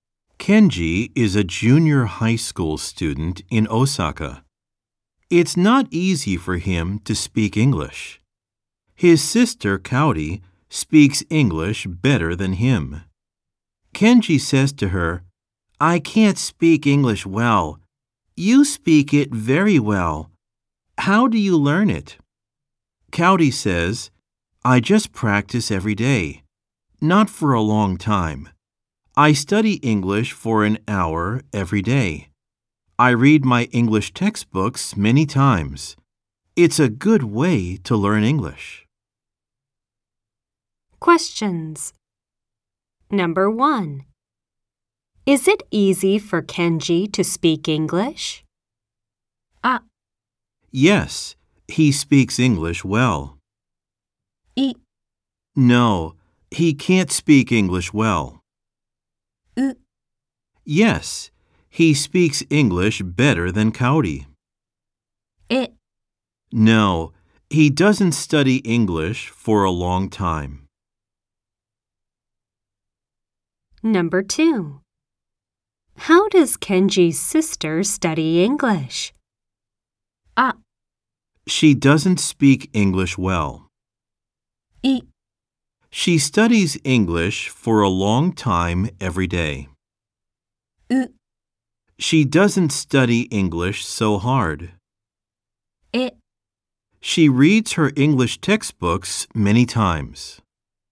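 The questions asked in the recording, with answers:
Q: Is it easy for Kenji to speak English?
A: い: No, he can't speak English well.

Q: How does Kenji's sister study English?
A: え: She reads her English textbooks many times.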